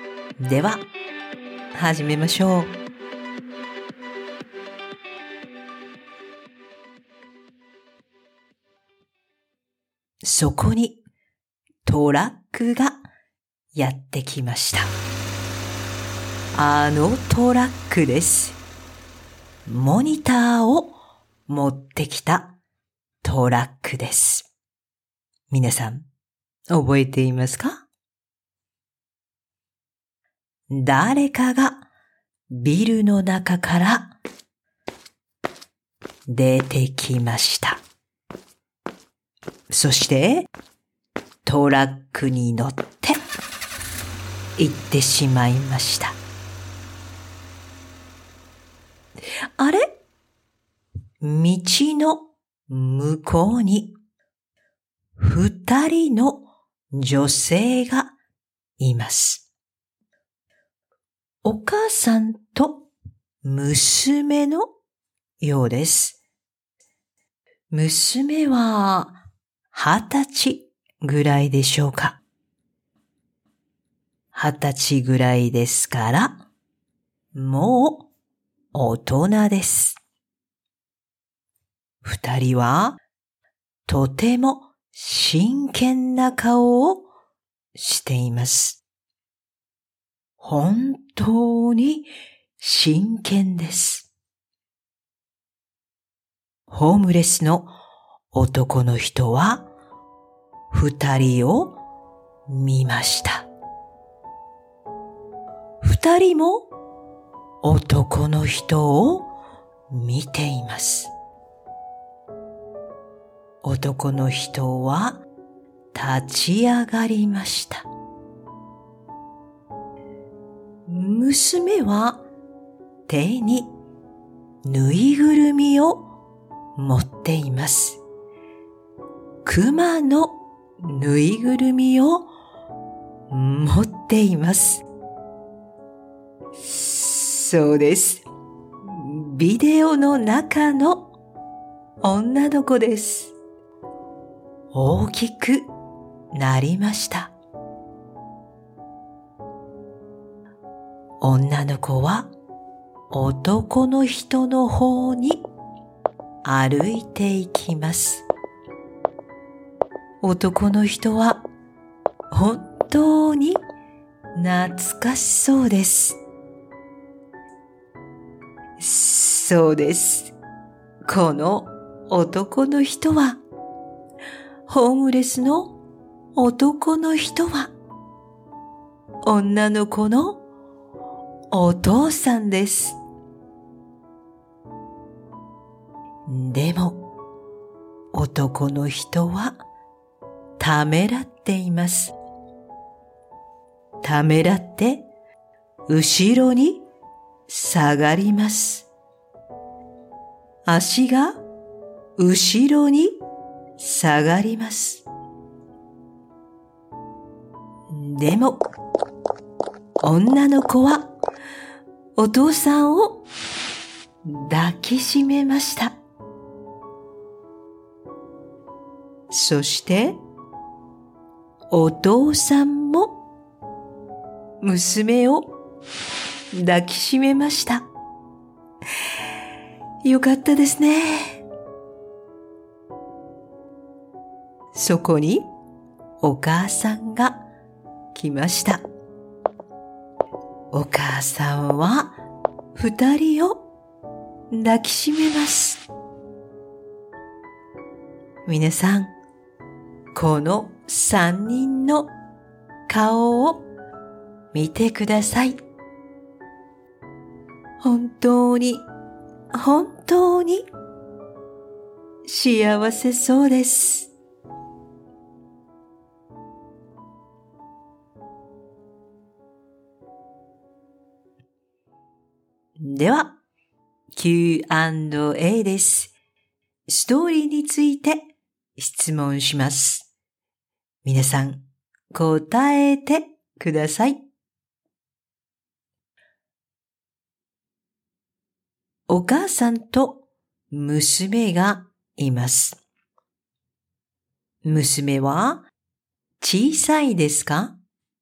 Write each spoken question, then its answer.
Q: お母さんと娘がいます。娘は小さいですか?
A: いいえ、小さくありません。大人です。もう大人です。